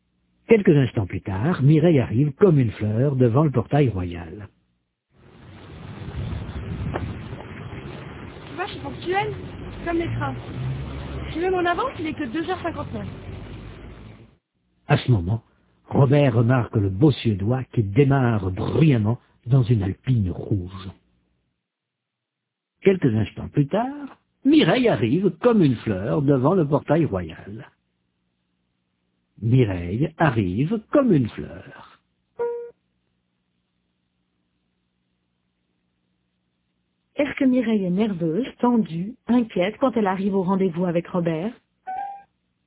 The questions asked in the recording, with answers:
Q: Est-ce que Mireille est nerveuse, tendue, inquiète quand elle arrive au rendez-vous avec Robert?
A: Non, elle arrive comme une fleur.